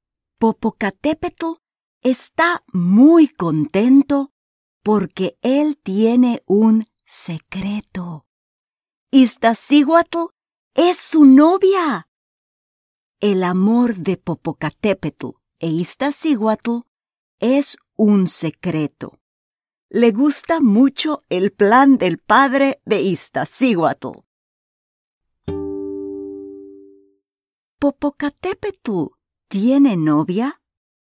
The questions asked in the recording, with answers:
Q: ¿Popocatépetl tiene novia?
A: Sí, tiene novia.